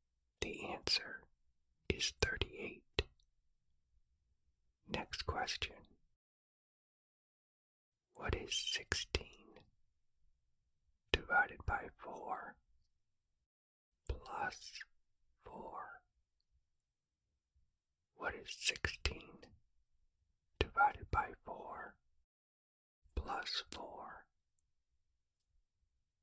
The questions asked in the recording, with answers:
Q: What is 16 divided by 4 plus 4?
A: The answer is 8.